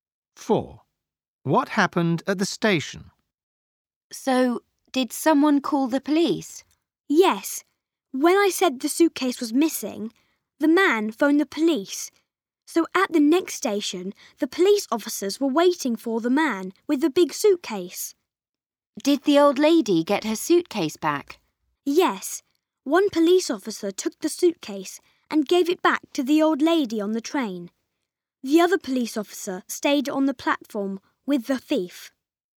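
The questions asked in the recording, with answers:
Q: What happened at the station?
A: Police officers were waiting, gave the suitcase back to the old lady and kept the thief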